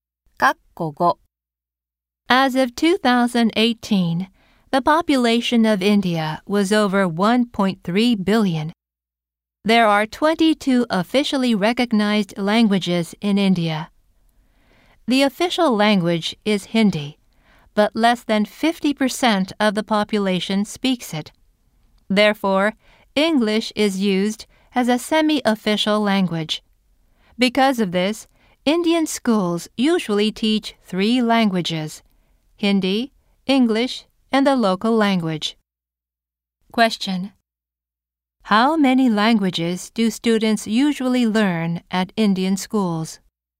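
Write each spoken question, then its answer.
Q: How many languages do students usually learn at Indian schools?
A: Three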